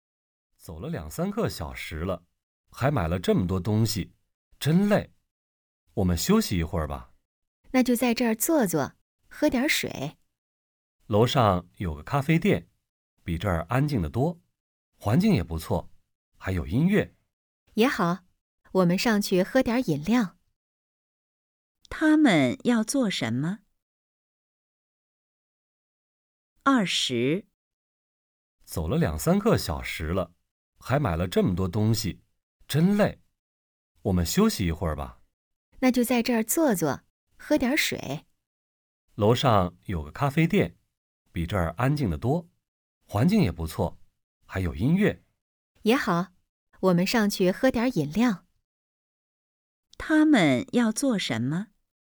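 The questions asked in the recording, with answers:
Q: 他们要做什么?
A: 去楼上咖啡店喝饮料、休息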